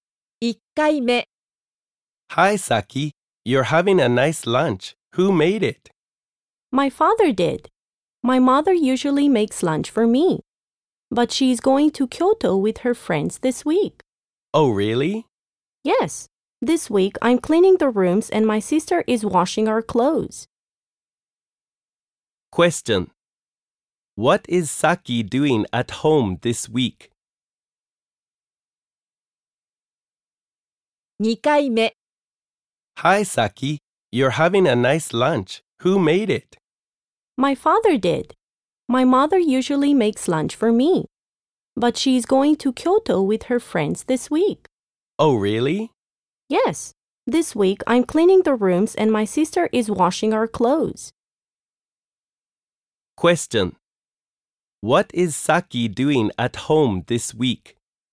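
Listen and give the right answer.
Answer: She is cleaning the rooms.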